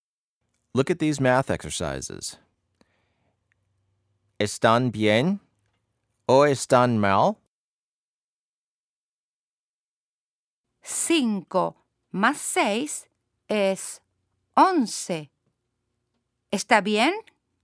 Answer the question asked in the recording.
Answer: Sí, está bien, muy bien.